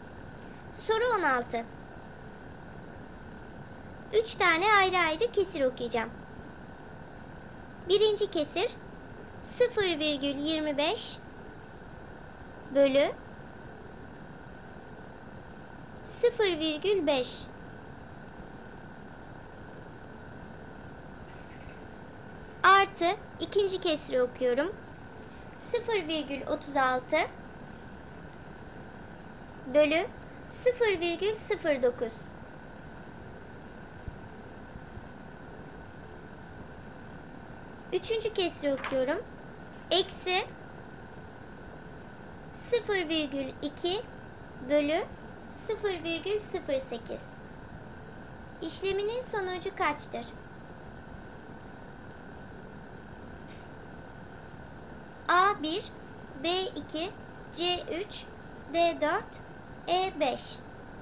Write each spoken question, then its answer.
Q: İşleminin sonucu kaçtır?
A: Doğru cevap B 2.